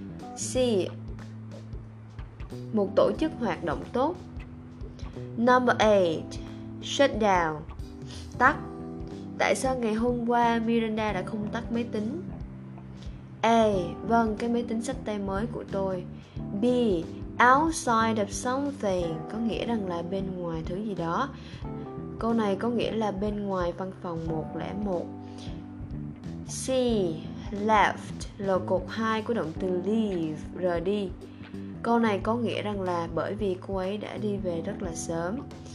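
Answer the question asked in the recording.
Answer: C: bởi vì cô ấy đã đi về rất là sớm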